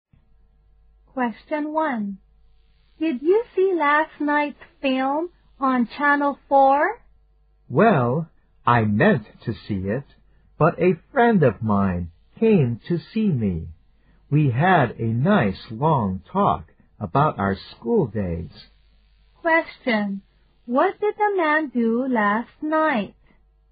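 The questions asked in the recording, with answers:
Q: What did the man do last night?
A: He talked with a friend about their school days.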